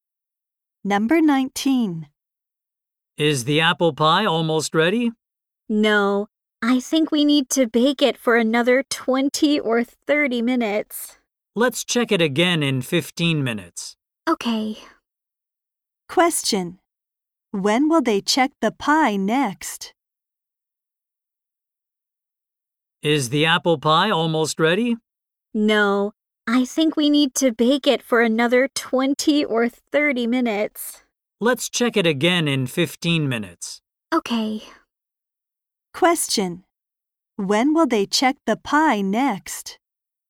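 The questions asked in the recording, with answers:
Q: When will they check the pie next?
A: In 15 minutes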